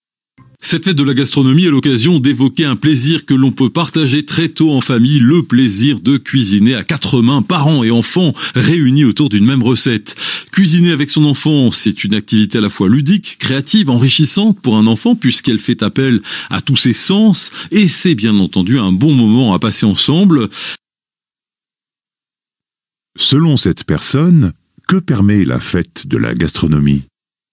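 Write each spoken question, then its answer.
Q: Selon cette personne, que permet la fête de la gastronomie ?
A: D'évoquer le plaisir de cuisiner en famille, parents et enfants ensemble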